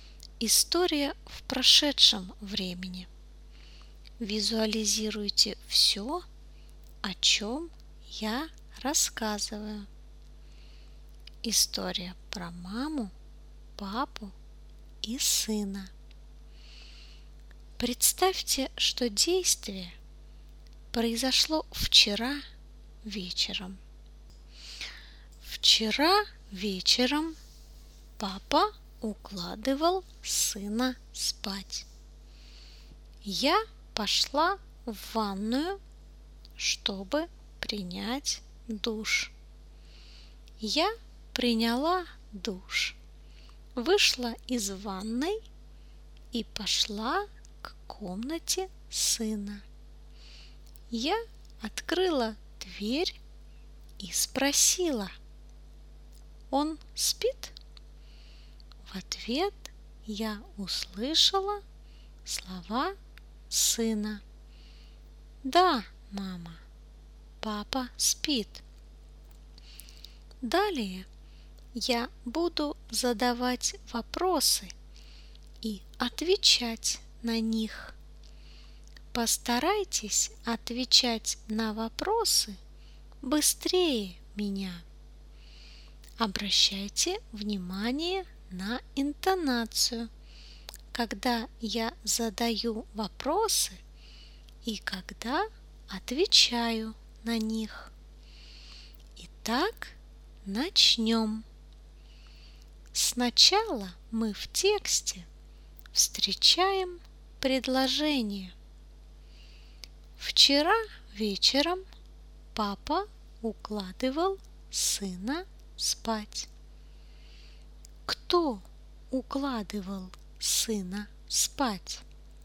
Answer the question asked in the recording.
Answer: Папа. Папа укладывал сына спать.